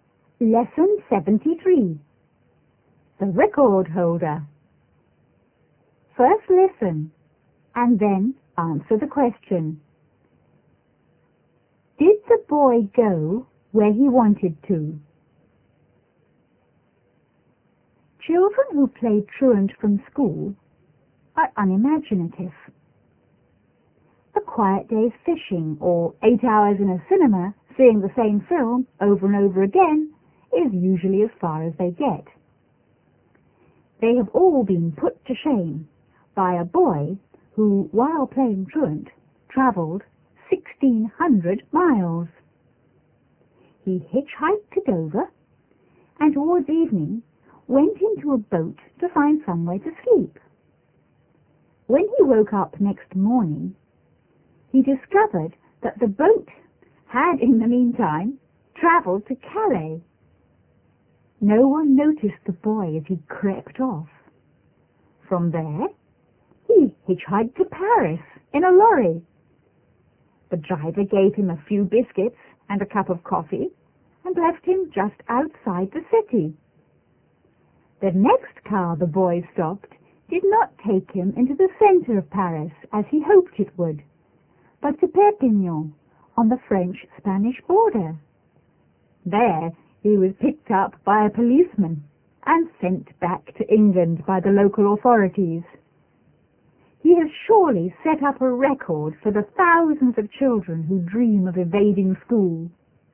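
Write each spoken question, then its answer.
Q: Did the boy go where he wanted to?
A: No, he wanted to go to Paris but ended up in Perpignan.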